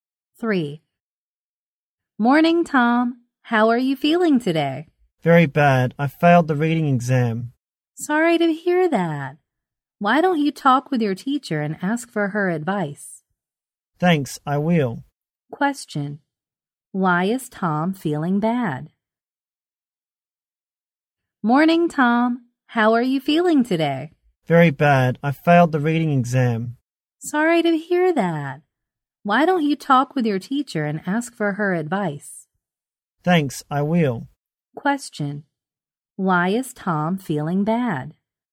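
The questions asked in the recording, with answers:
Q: Why is Tom feeling bad?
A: He failed the reading exam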